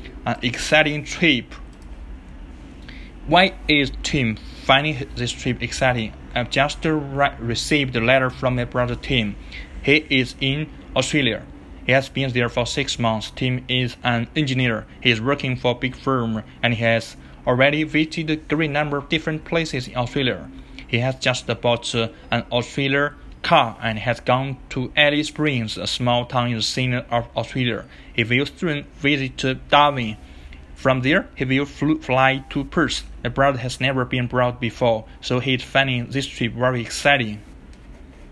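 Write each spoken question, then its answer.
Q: Why is Tim finding this trip exciting?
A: Because he has never been abroad before.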